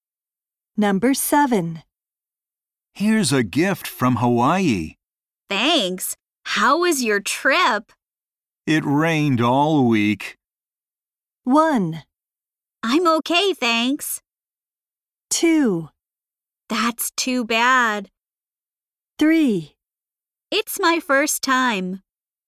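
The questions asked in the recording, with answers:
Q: It rained all week.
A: 2: That's too bad.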